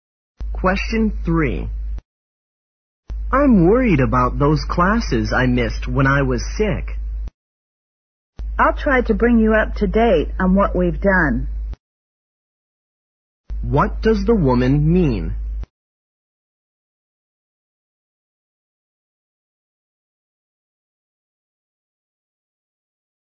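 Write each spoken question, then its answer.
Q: What does the woman mean?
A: She will help him catch up on the classes he missed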